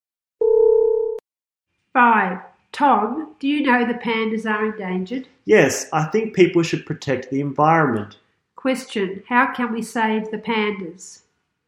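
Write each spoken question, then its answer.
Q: how can we save the pandas?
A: By protecting the environment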